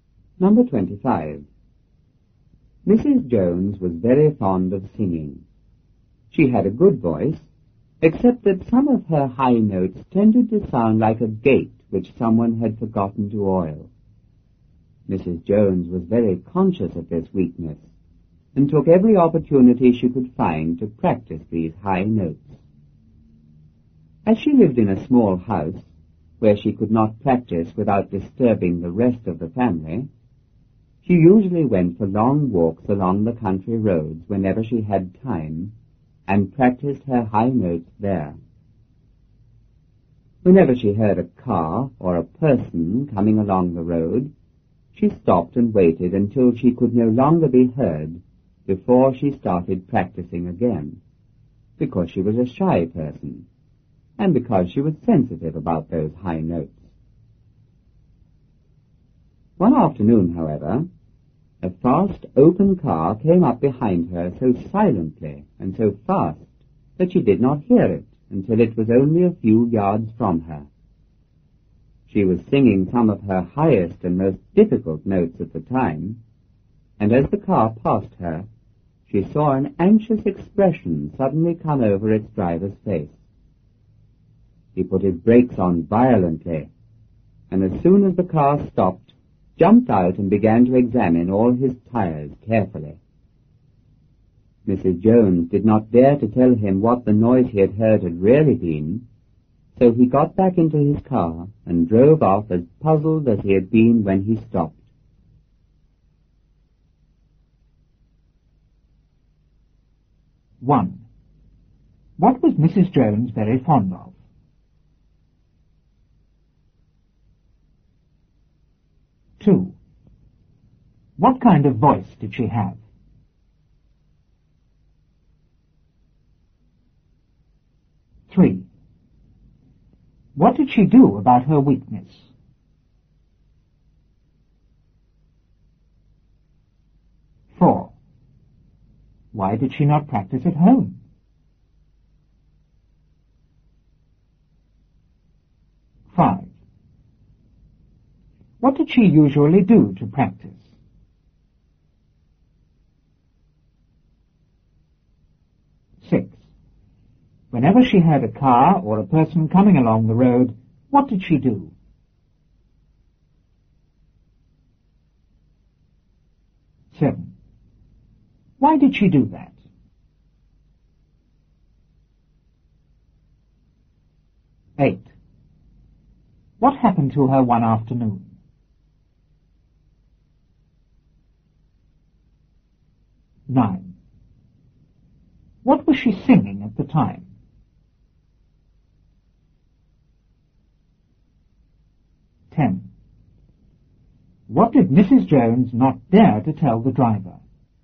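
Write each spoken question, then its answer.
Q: What was Mrs. Jones very fond of?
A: Singing

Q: What kind of voice did she have?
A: A good voice, though some high notes sounded like an unoiled gate

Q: What did she do about her weakness?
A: She took every opportunity to practice her high notes

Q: Why did she not practice at home?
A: Her house was small and she would disturb the family

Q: What did she usually do to practice?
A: She went for long walks along country roads and practiced there

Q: Whenever she heard a car or a person coming along the road, what did she do?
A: She stopped and waited until she could no longer be heard

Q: Why did she do that?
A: She was shy and sensitive about her high notes

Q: What happened to her one afternoon?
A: A fast, silent open car came up behind her before she heard it

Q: What was she singing at the time?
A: Some of her highest and most difficult notes

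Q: What did Mrs. Jones not dare to tell the driver?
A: That the noise he heard was her singing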